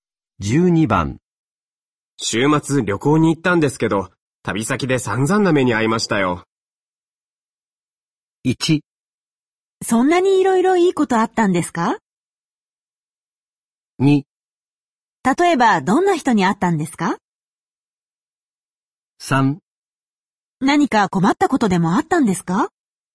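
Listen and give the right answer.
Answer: 3: 何か困ったことでもあったんですか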